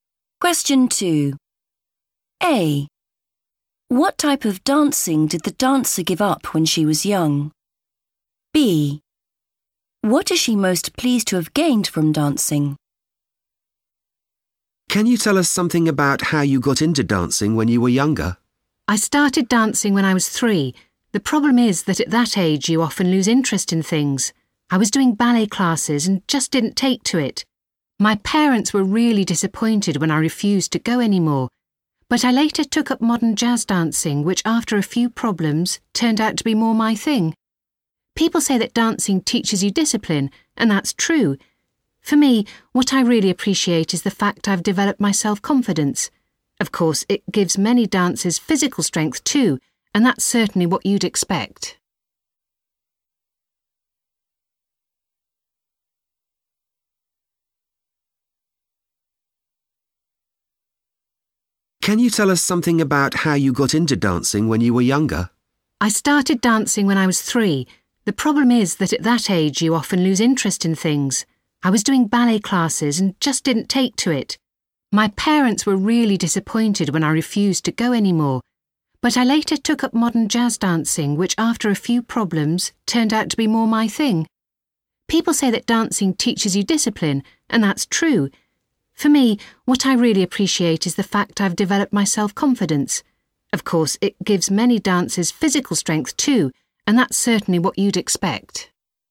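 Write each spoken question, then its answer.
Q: What type of dancing did the dancer give up when she was young?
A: ballet

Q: What is she most pleased to have gained from dancing?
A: self-confidence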